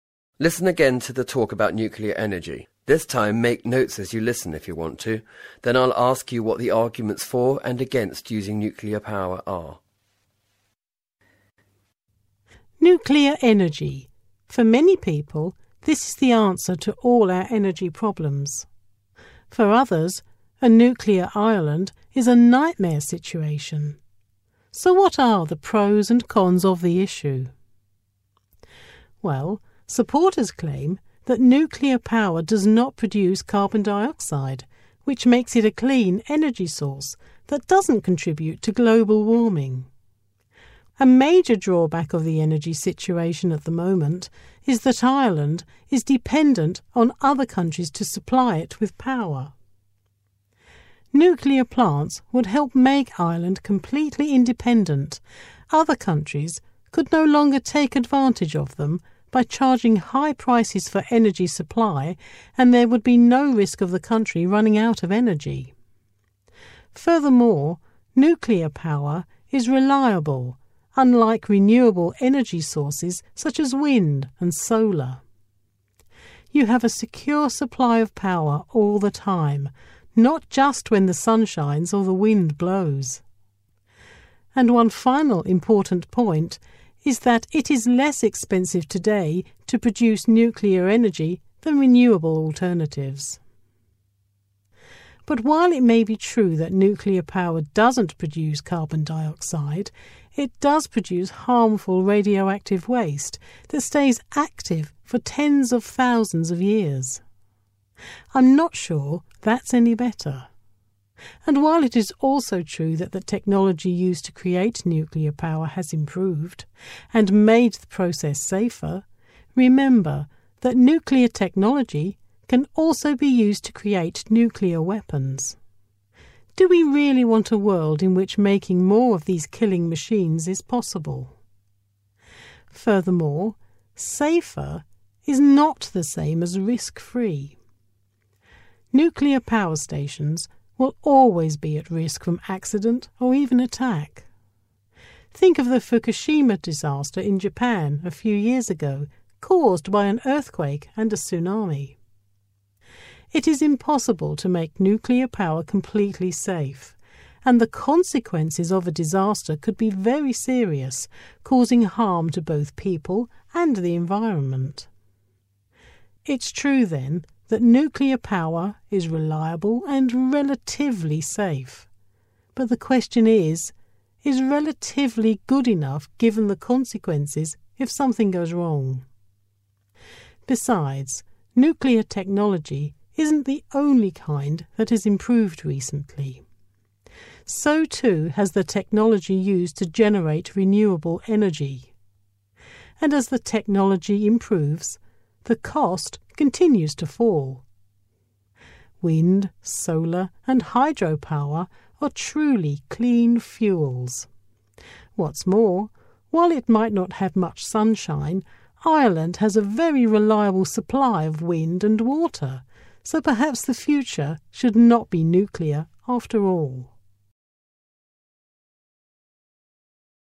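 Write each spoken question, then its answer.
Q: Then I'll ask you what the arguments for and against using nuclear power are.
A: For: produces no carbon dioxide, makes Ireland energy-independent, is reliable and is cheaper than renewables. Against: radioactive waste, link to nuclear weapons, risk of accident or attack, and renewables are improving and getting cheaper.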